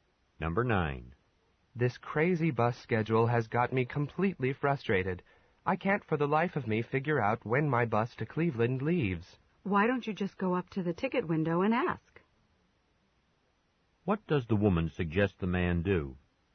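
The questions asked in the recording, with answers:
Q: What does the woman suggest the man do?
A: Ask at the ticket window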